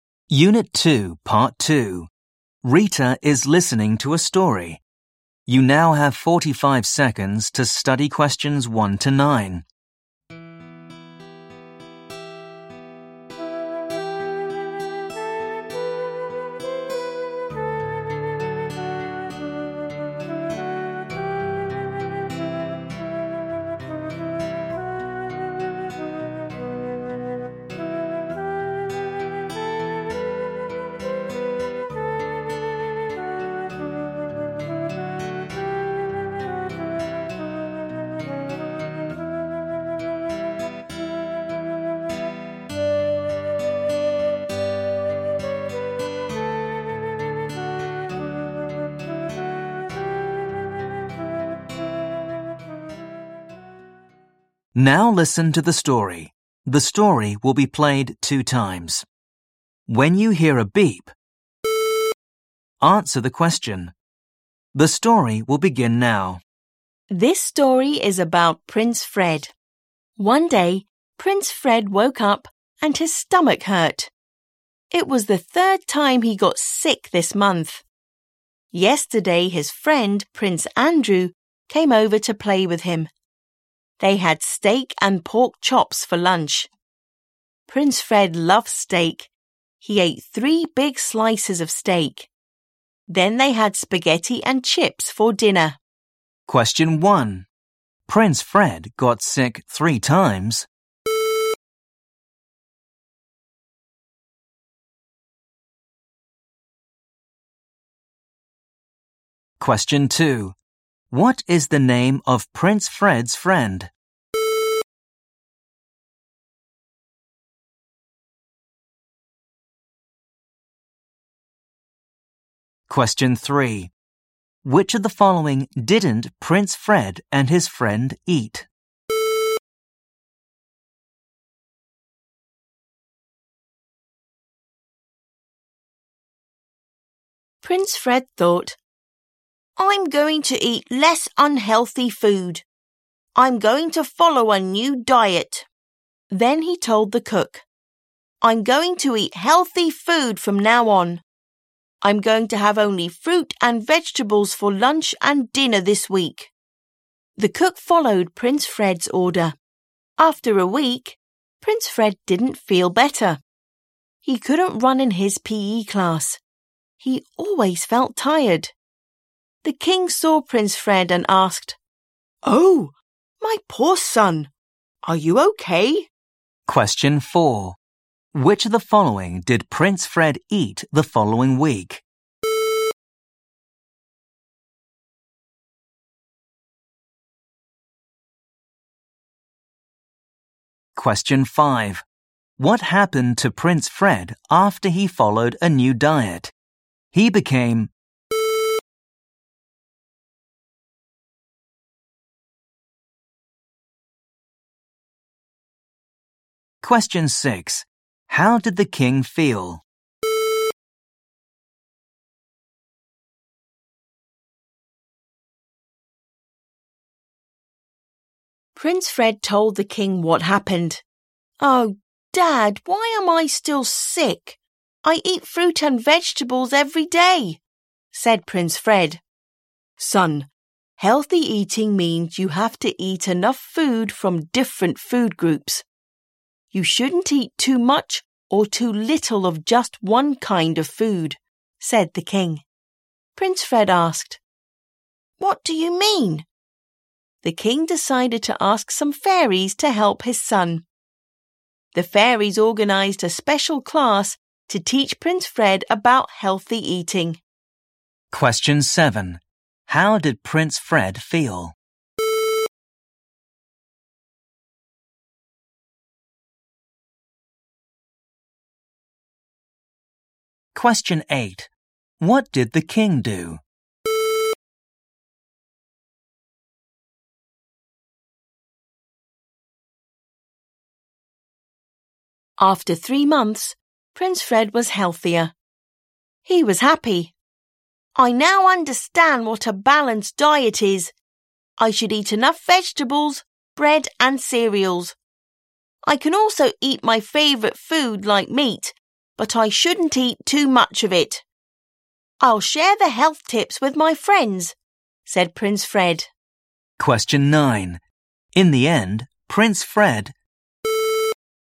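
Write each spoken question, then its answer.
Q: Prince Fred got sick 3 times.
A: True

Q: What is the name of Prince Fred's friend?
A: Prince Andrew

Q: Which of the following did Prince Fred eat the following week?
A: fruit and vegetables

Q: What happened to Prince Fred after he followed a new diet? He became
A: tired

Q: What did the king do?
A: He asked some fairies to help his son.

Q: In the end, Prince Fred...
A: was healthier and happy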